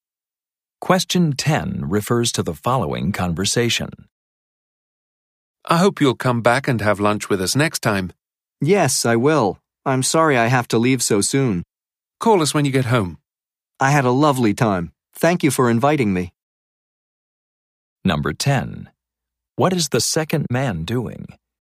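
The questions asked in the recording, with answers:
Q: What is the second man doing?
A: Leaving after a visit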